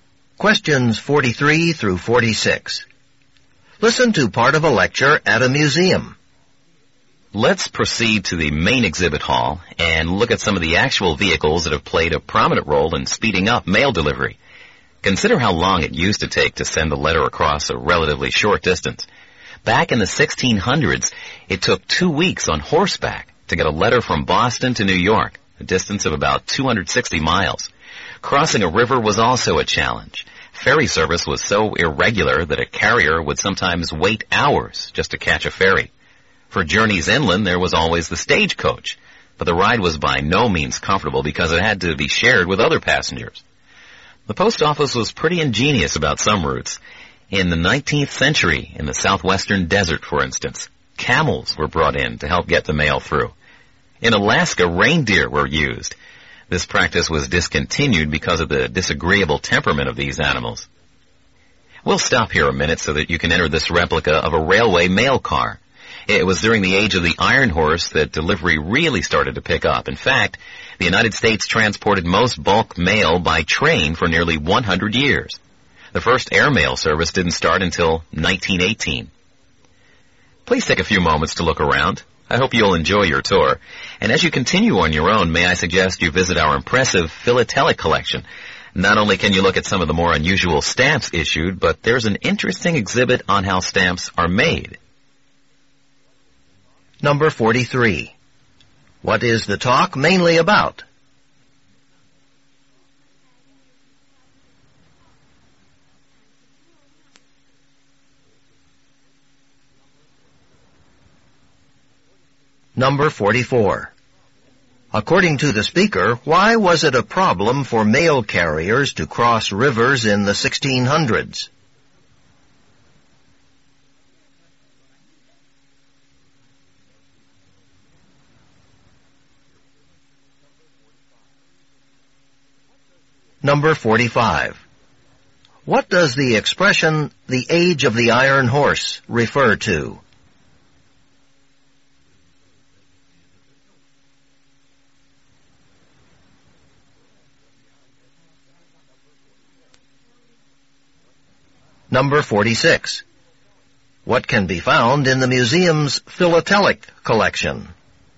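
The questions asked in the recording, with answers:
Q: What is the talk mainly about?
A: The history of mail delivery methods

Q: According to the speaker, why was it a problem for mail carriers to cross rivers in the 1600s?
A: Ferry service was irregular, so carriers sometimes waited hours

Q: What does the expression, the age of the iron horse, refer to?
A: The era of railroads/trains

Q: What can be found in the museum's philatelic collection?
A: Unusual stamps and an exhibit on how stamps are made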